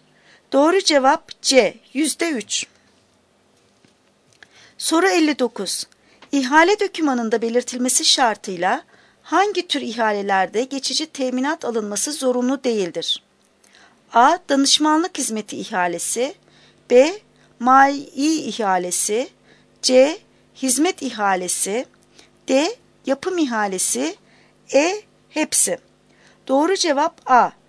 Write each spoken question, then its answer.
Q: İhale dokümanında belirtilmesi şartıyla hangi tür ihalelerde geçici teminat alınması zorunlu değildir?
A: Doğru cevap A. Danışmanlık hizmeti ihalesi.